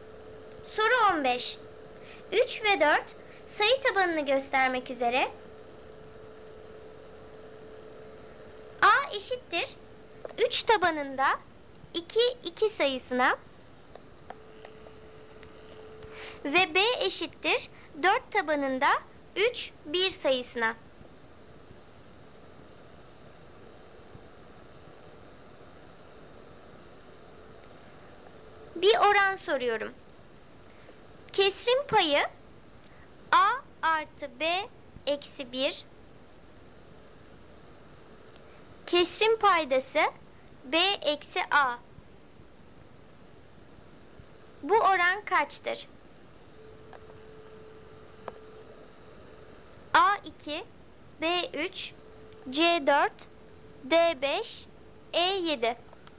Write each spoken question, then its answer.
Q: Bu oran kaçtır?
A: Doğru cevap C 4.